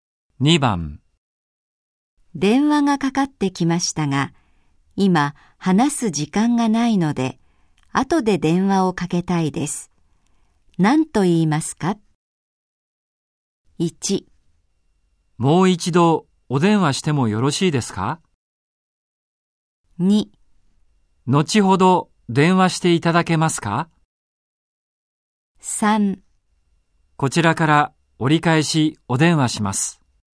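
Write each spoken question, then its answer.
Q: 何と言いますか?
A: 3: こちらから折り返しお電話します。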